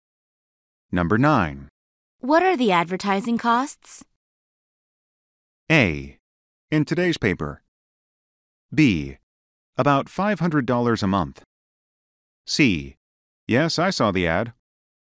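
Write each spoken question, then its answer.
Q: What are the advertising costs?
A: B: About $500 a month.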